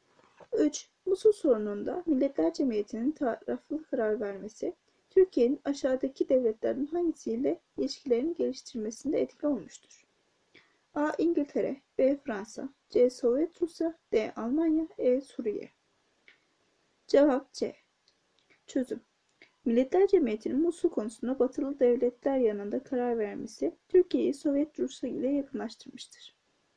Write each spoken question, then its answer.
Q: Musul sorununda Milletler Cemiyeti'nin taraflı karar vermesi, Türkiye'nin aşağıdaki devletlerin hangisiyle ilişkilerini geliştirmesinde etkili olmuştur?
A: Cevap C.